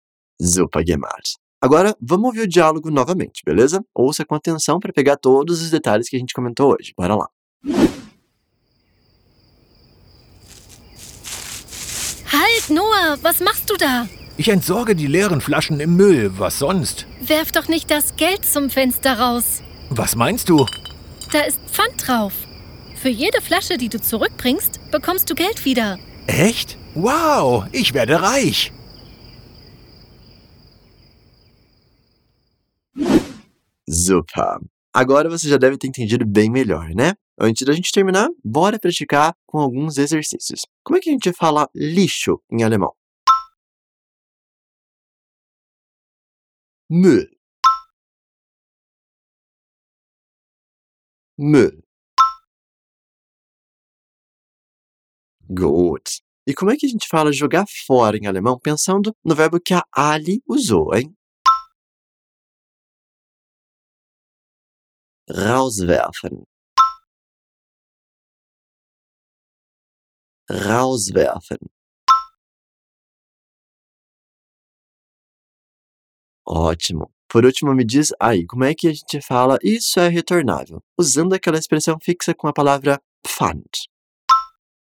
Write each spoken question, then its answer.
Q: Como é que a gente fala lixo em alemão?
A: Mü,

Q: E como é que a gente fala jogar fora em alemão pensando no verbo que a Ali usou, hein?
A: rauswerfen

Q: Por último, me diz aí, como é que a gente fala isso é retornável?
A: Da ist Pfand drauf.